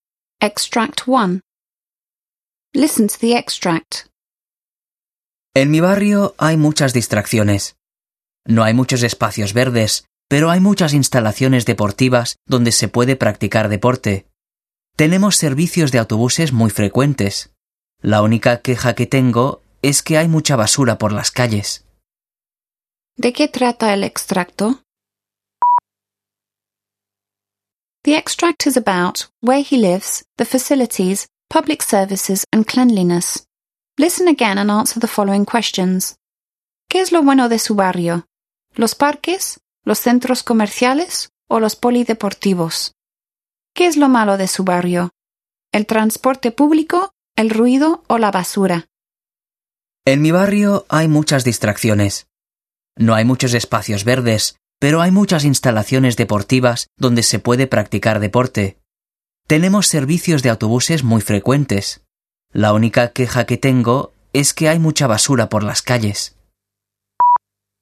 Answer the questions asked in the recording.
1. The extract is about where he lives, the facilities, public services and cleanliness.
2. The good thing about where he lives is the sports centres.
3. The bad thing is the rubbish.